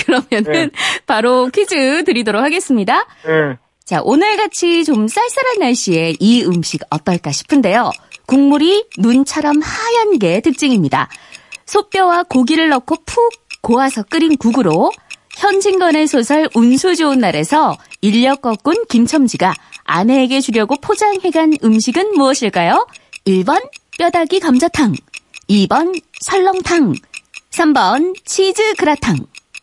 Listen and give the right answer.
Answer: 2번 설렁탕. 네. 정답입니다.